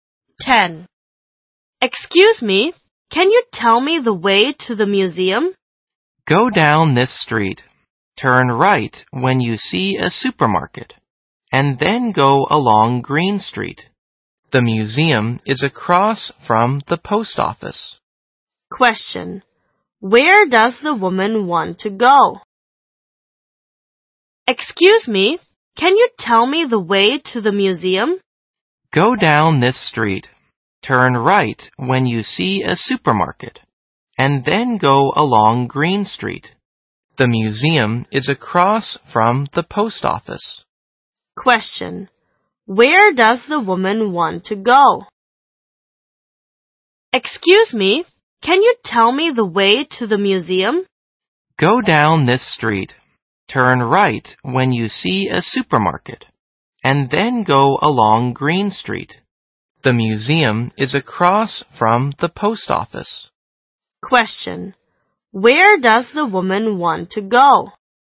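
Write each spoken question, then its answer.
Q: Where does the woman want to go?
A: The museum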